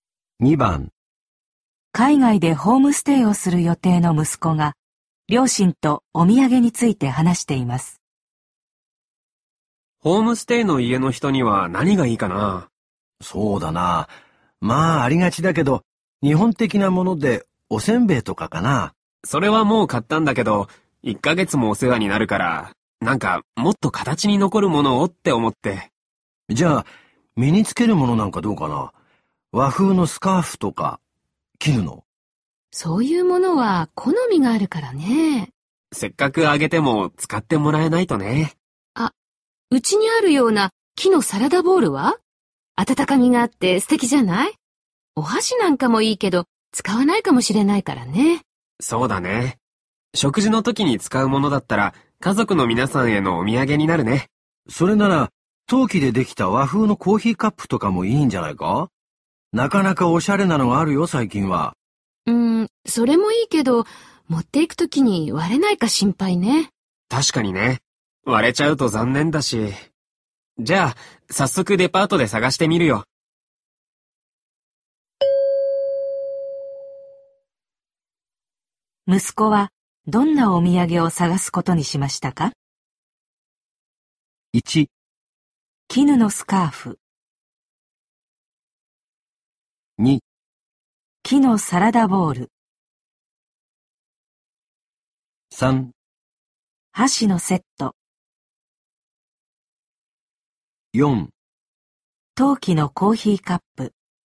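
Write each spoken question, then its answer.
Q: 息子はどんなお土産を探すことにしましたか?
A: 2: 木のサラダボウル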